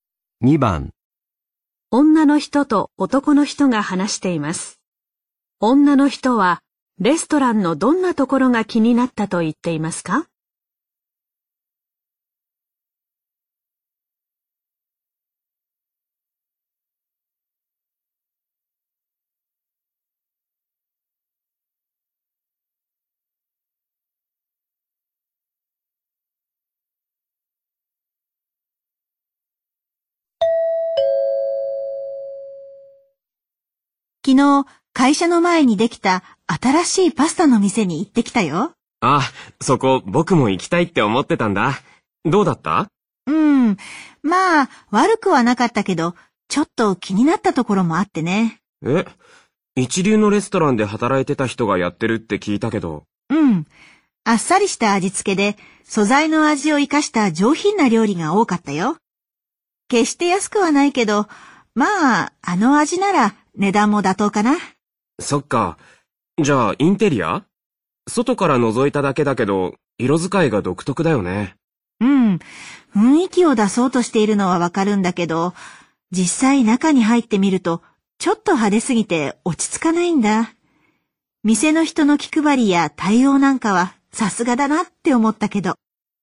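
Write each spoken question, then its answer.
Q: 女の人はレストランのどんなところが気になったと言っていますか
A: インテリアが派手すぎて落ち着かないところ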